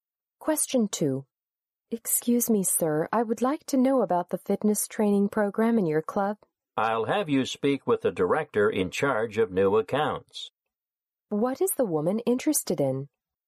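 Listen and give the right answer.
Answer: The club's fitness training program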